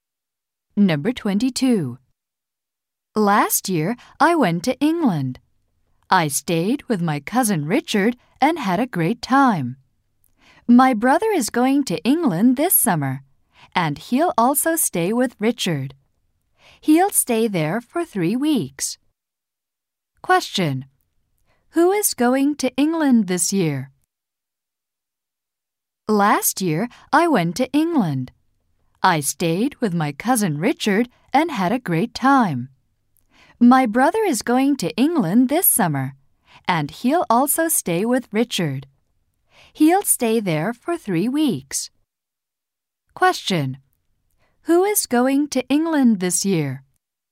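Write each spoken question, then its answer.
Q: Question. Who is going to England this year?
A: The speaker's brother.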